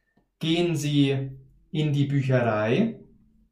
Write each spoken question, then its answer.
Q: Gehen Sie in die Bücherei?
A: Nein, Sie gehen nicht in die Bücherei, sondern Sie gehen in den Zoo.